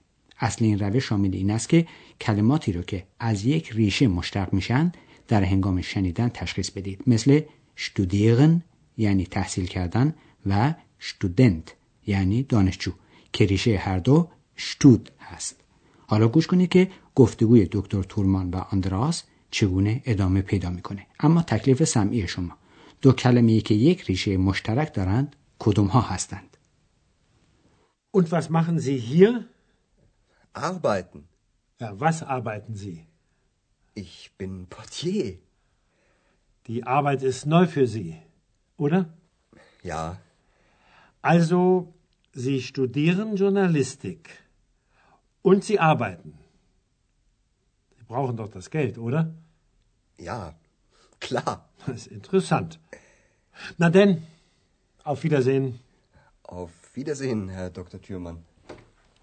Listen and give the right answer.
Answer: دو کلمه مورد نظر ما که ریشه مشترک دارند کار کردن و کار بود که ریشه هر دو اغباید است.